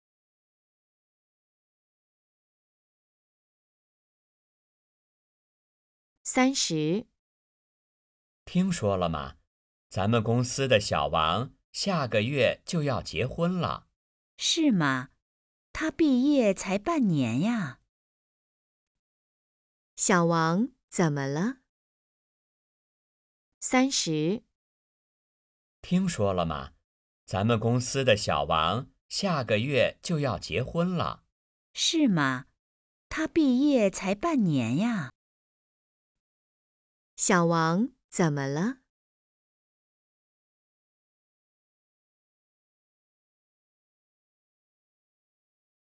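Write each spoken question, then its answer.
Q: 小王怎么了?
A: 下个月要结婚了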